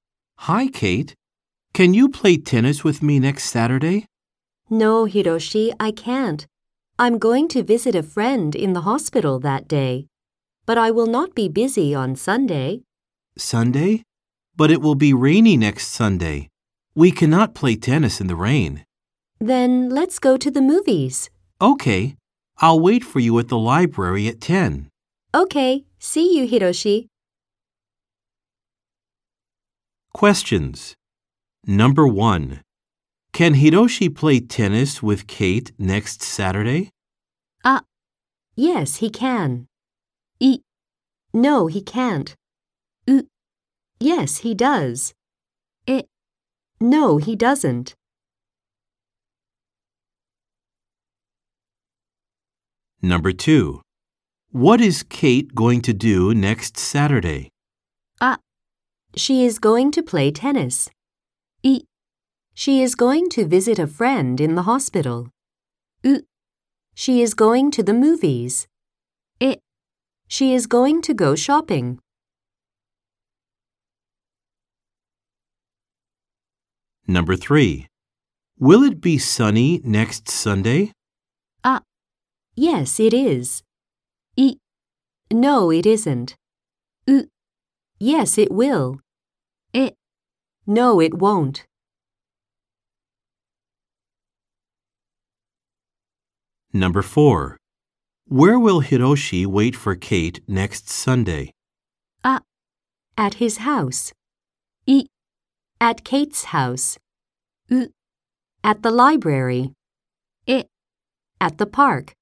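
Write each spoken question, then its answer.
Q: Can Hiroshi play tennis with Kate next Saturday?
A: い: no, he can't.

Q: What is Kate going to do next Saturday?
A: い: She is going to visit a friend in the hospital.

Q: Will it be sunny next Sunday?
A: え: No, it won't.

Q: Where will Hiroshi wait for Kate next Sunday?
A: う: At the library.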